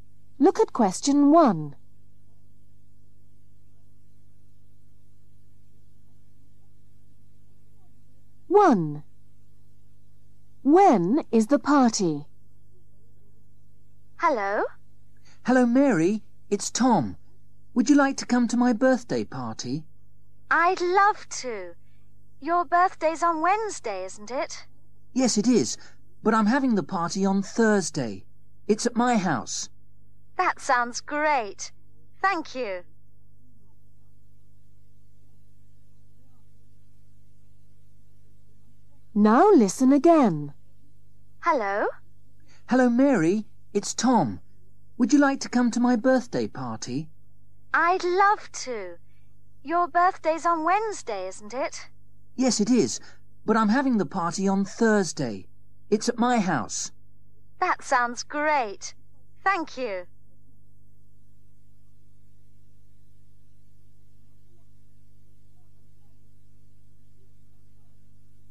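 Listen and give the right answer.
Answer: On Thursday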